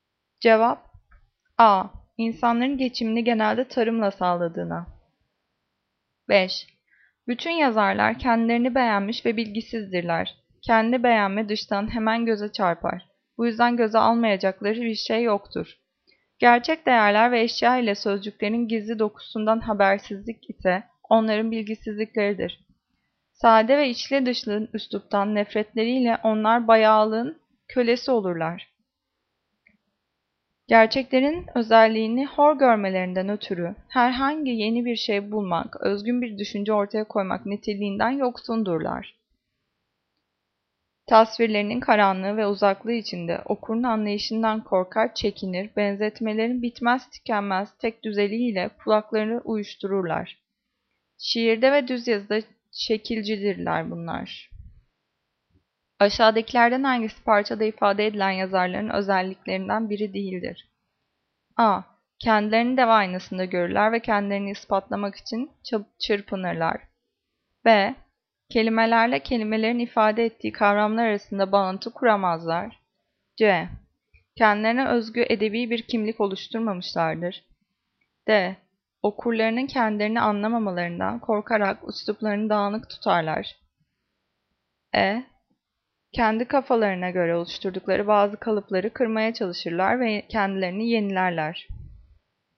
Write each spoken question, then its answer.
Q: Aşağıdakilerden hangisi parçada ifade edilen yazarların özelliklerinden biri değildir?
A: Cevap E. Kendi kafalarına göre oluşturdukları bazı kalıpları kırmaya çalışırlar ve kendilerini yenilerler.